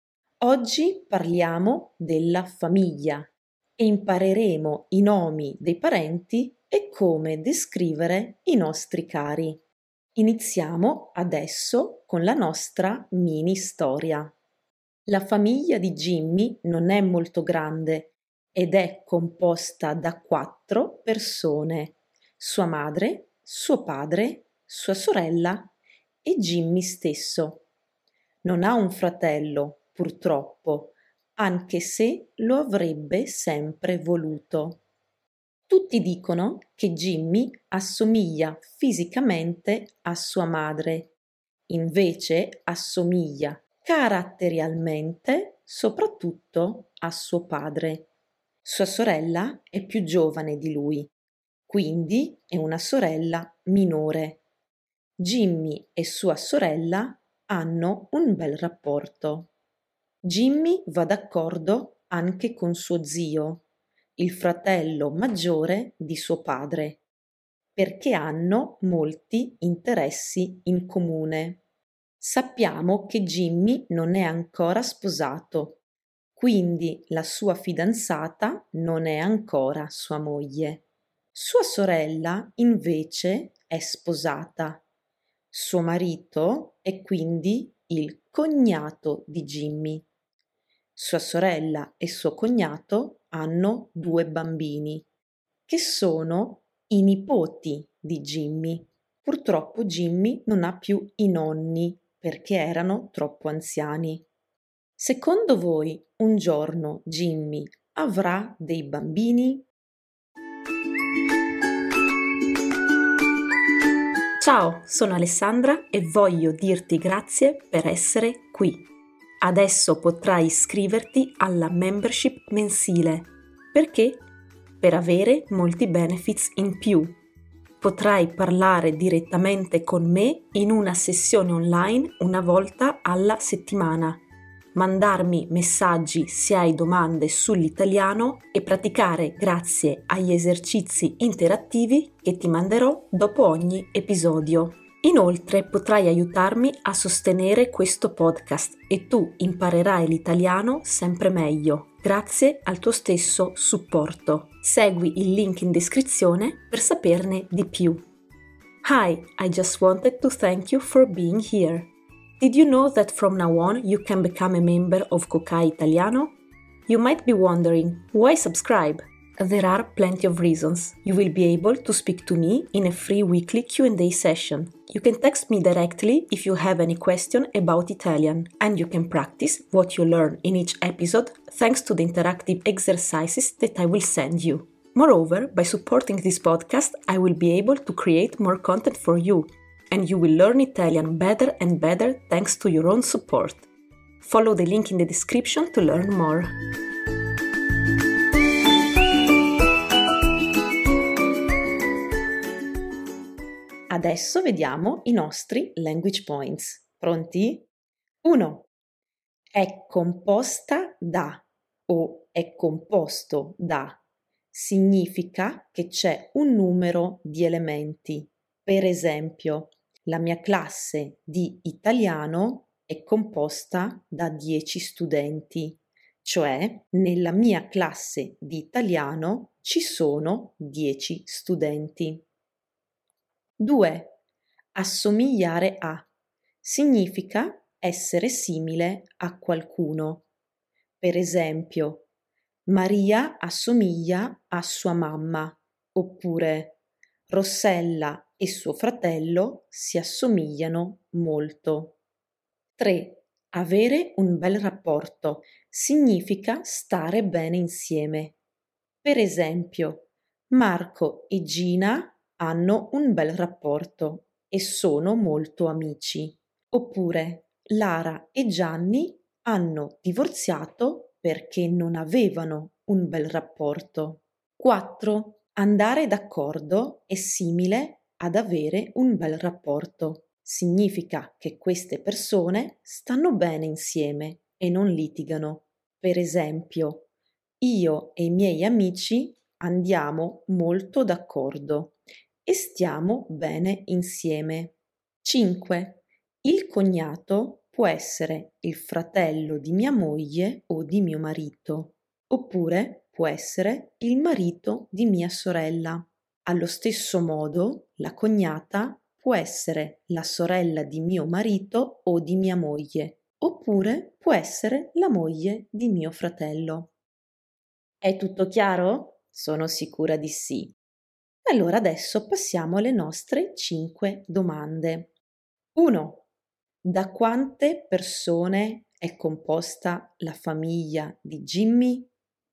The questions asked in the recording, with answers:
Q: Da quante persone è composta la famiglia di Jimmy?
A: La famiglia di Jimmy è composta da 4 persone.